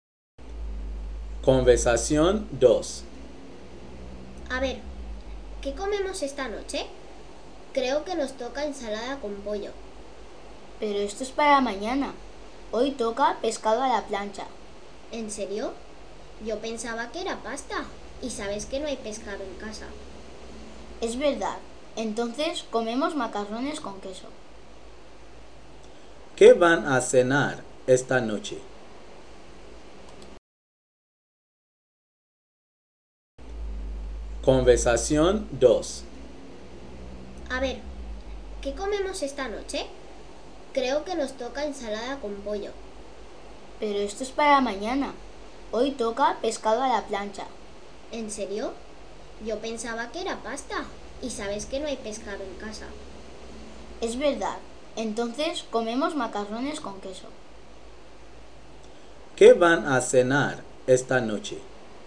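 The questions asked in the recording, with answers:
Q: ¿Qué van a cenar esta noche?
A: Macarrones con queso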